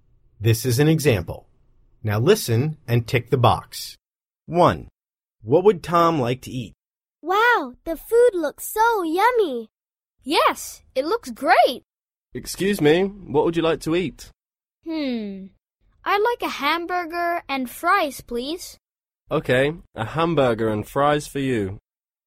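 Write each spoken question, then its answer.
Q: What would Tom like to eat?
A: A hamburger and fries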